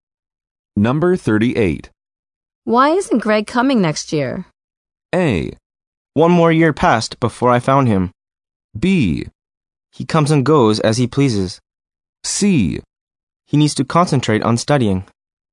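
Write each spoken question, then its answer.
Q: Why isn't Greg coming next year?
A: C: He needs to concentrate on studying.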